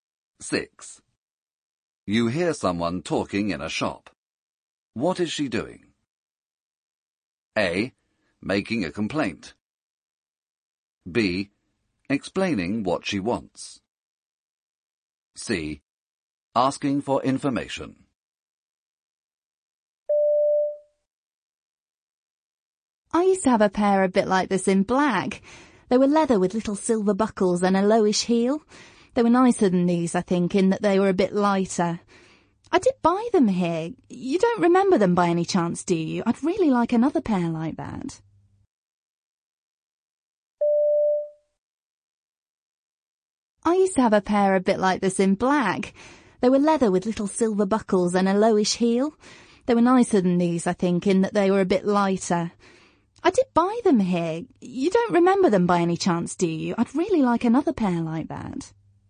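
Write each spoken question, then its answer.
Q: What is she doing?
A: B: Explaining what she wants.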